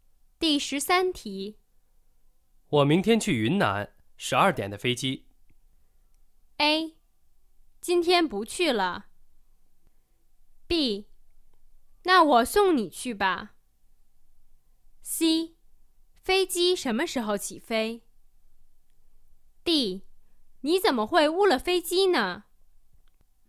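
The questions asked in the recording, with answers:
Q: 我明天去云南,12点的飞机。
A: B: 那我送你去吧。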